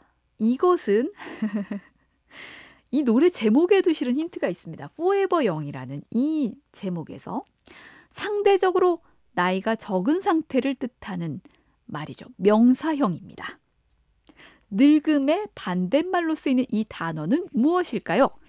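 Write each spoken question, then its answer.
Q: 늙음의 반대말로 쓰이는 이 단어는 무엇일까요?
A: 젊음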